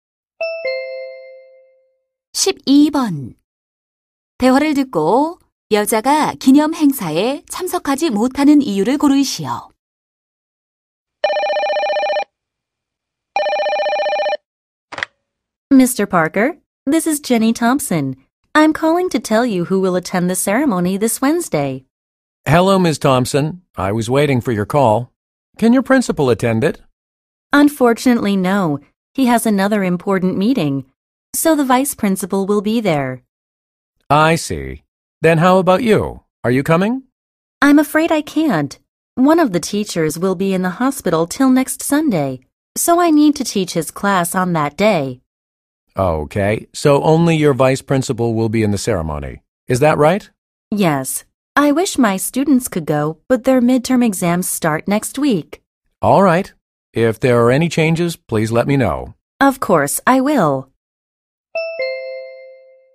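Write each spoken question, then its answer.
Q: 대화를 듣고 여자가 기념 행사에 참석하지 못하는 이유를 고르시오.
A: 입원한 동료 교사 대신 수업을 해야 해서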